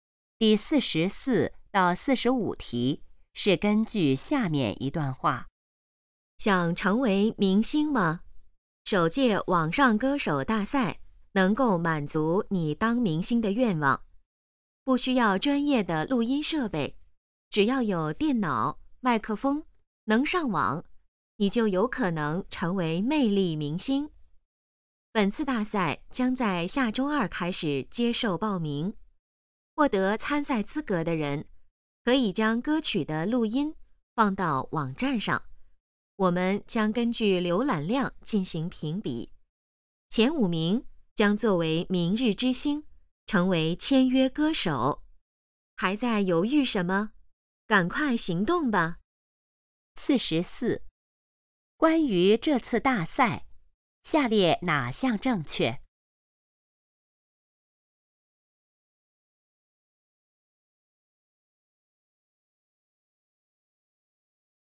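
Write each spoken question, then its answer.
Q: 谁能成为签约歌手?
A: 浏览量前五名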